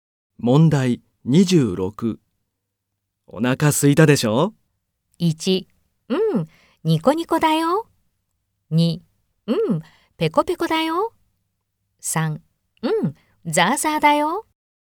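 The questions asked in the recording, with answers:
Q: お腹空いたでしょ?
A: 3: うん、ペコペコだよ。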